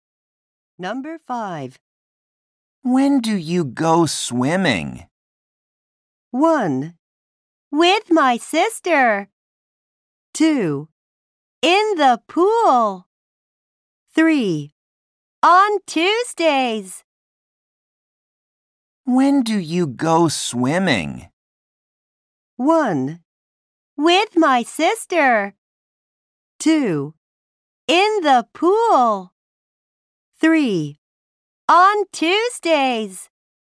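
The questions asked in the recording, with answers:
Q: When do you go swimming?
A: 3: On Tuesdays.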